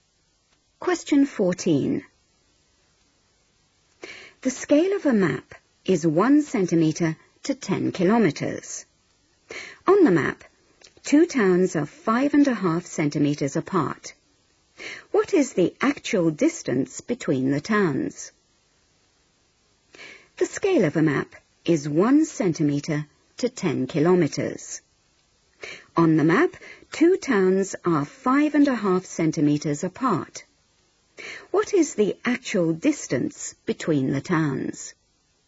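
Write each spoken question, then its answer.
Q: What is the actual distance between the towns?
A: 55 km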